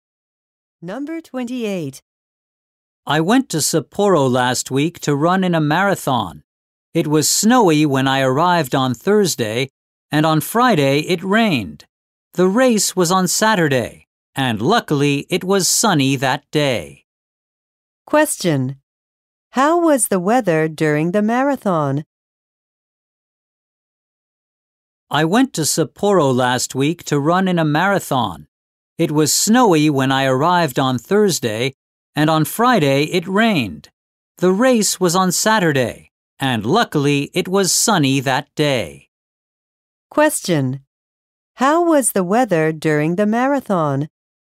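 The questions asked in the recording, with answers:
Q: Question. How was the weather during the marathon?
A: It was sunny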